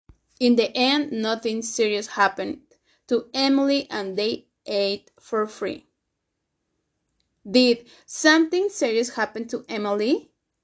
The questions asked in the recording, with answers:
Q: Did something serious happen to Emily?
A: No, nothing serious happened to her.